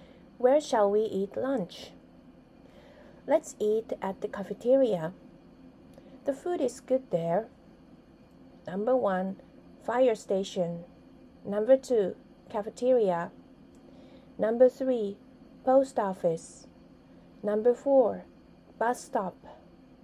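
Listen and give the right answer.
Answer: 2: cafeteria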